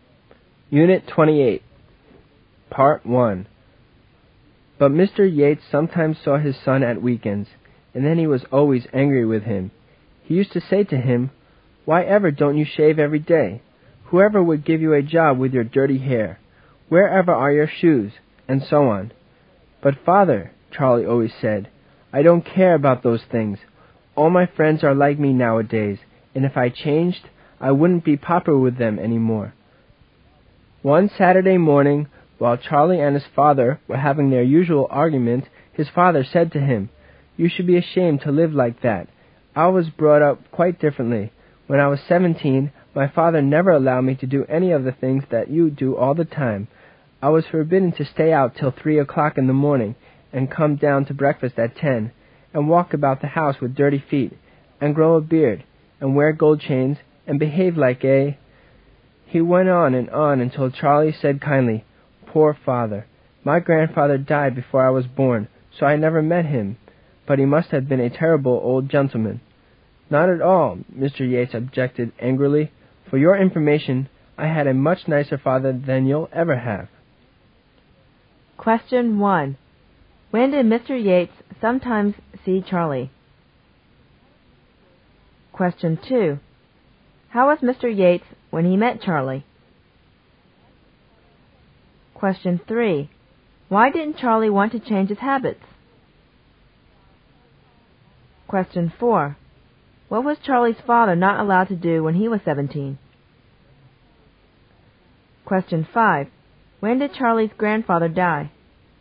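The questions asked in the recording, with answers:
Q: When did Mr. Yates sometimes see Charlie?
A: At weekends

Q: How was Mr. Yates when he met Charlie?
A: Always angry with him

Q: Why didn't Charlie want to change his habits?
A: He wouldn't be popular with his friends anymore

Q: What was Charlie's father not allowed to do when he was 17?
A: Stay out till 3 a.m., come down to breakfast at 10, walk about with dirty feet, grow a beard, wear gold chains

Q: When did Charlie's grandfather die?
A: Before Charlie was born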